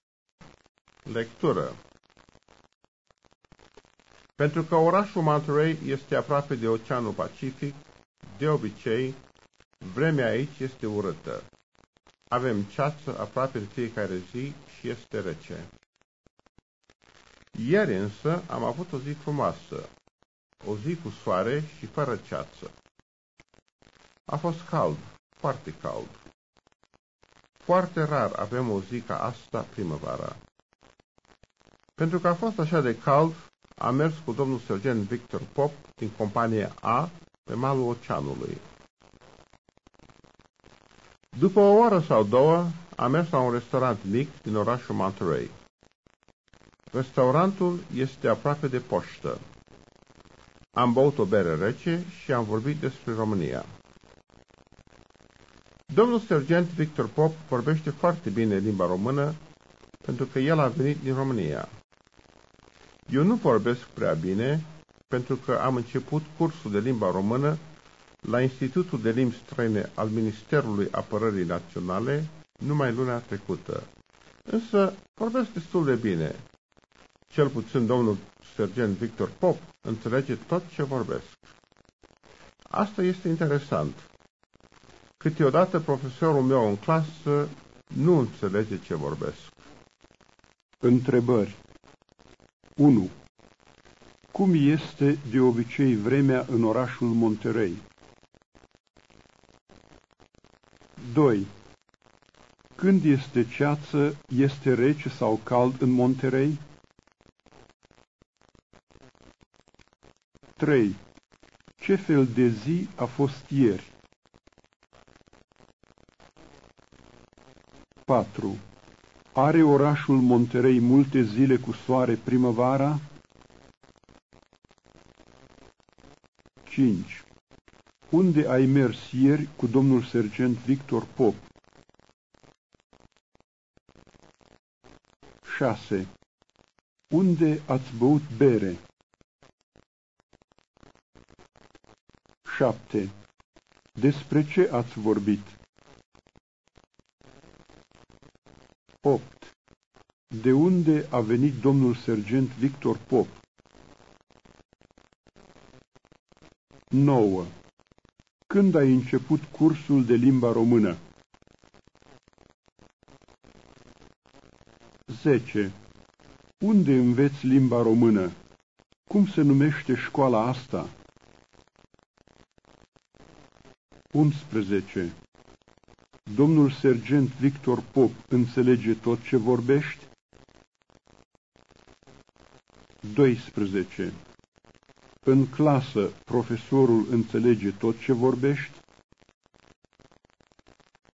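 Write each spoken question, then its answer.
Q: Cum este de obicei vremea în orașul Monterey?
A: Urâtă

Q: Când este ceață, este rece sau cald în Monterey?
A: Rece

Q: Ce fel de zi a fost ieri?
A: O zi frumoasă, cu soare, fără ceață, foarte caldă

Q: Are orașul Monterey multe zile cu soare primăvara?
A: Nu, foarte rar

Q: Unde ai mers ieri cu domnul sergent Victor Pop?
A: Pe malul oceanului

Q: Unde ați băut bere?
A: La un restaurant mic din Monterey, aproape de poștă

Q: Despre ce ați vorbit?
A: Despre România

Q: De unde a venit domnul sergent Victor Pop?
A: Din România

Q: Când ai început cursul de limba română?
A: Luna trecută

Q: Unde înveți limba română?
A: La Institutul de Limbi Străine al Ministerului Apărării Naționale

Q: Cum se numește școala asta?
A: Institutul de Limbi Străine al Ministerului Apărării Naționale

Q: Domnul sergent Victor Pop înțelege tot ce vorbești?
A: Da

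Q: În clasă, profesorul înțelege tot ce vorbești?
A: Nu, câteodată nu înțelege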